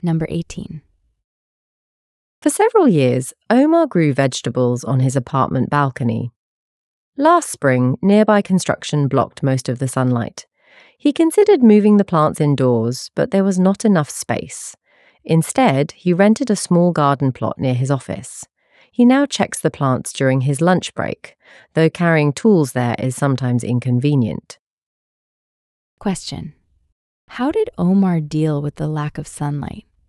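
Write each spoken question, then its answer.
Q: How did Omar deal with the lack of sunlight?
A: He rented a small garden plot near his office.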